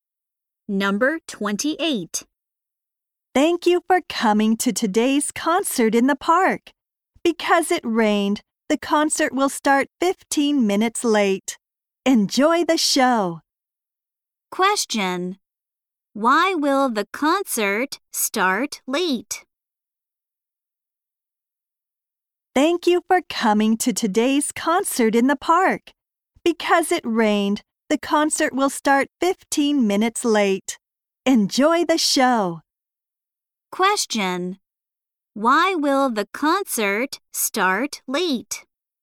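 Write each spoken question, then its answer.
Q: Why will the concert start late?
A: Because it rained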